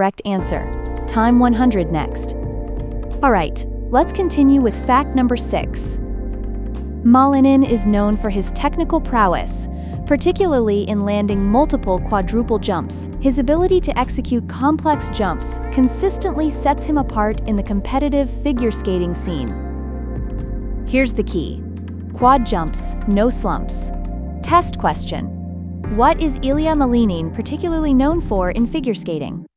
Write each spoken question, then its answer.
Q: What is Ilya Malinin particularly known for in figure skating?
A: Technical prowess in quadruple jumps.